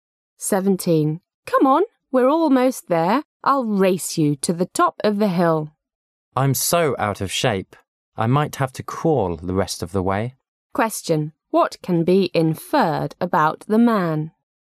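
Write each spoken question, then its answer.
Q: What can be inferred about the man?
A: He is tired and out of shape

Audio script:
I'll race you to the top of the hill. M: I'm so out of shape; I might have to crawl the rest of the way. Q: What can be inferred about the man?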